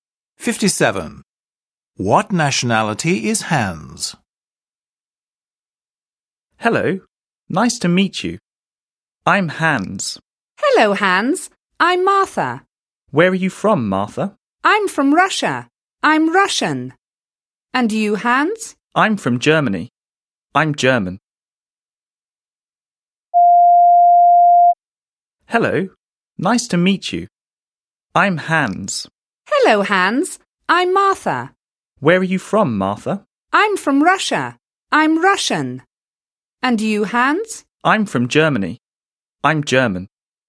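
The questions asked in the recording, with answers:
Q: What nationality is Hans?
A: German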